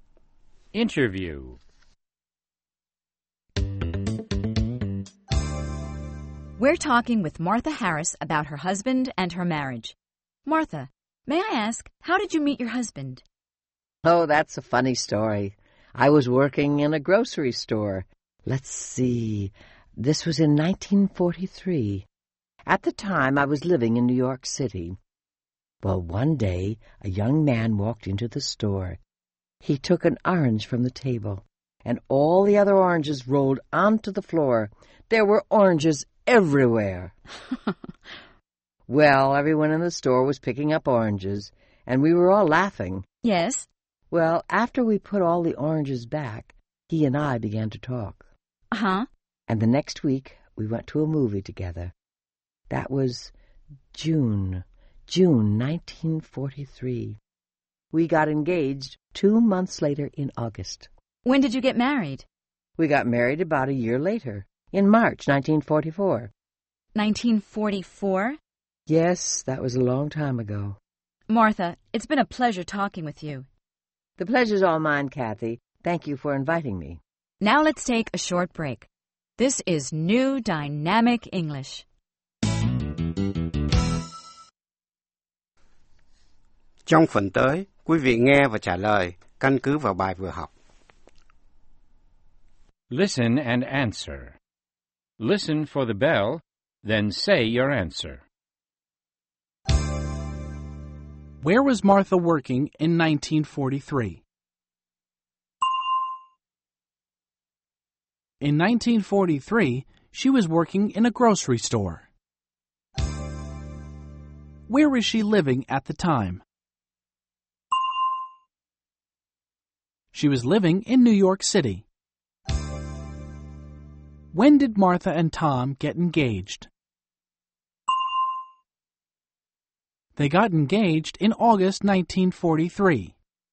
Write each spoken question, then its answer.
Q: Where was Martha working in 1943?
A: In 1943, she was working in a grocery store.

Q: Where was she living at the time?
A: She was living in New York City.